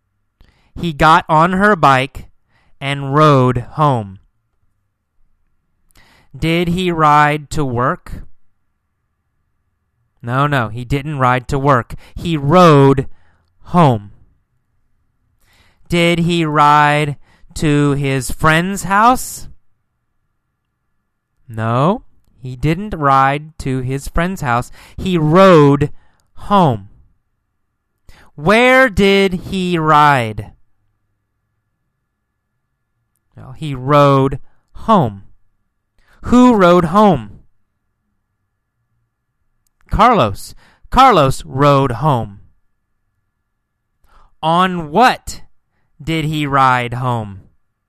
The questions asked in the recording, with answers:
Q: On what did he ride home?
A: On her bike, right? He rode home on her bike.